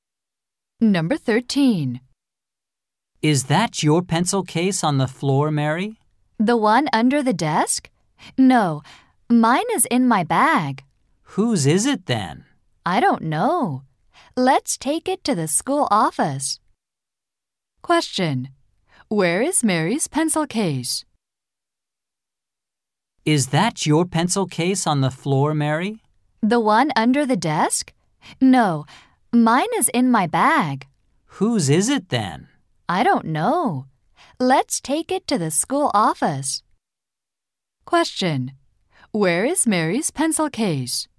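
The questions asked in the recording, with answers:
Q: Where is Mary's pencil case?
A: In her bag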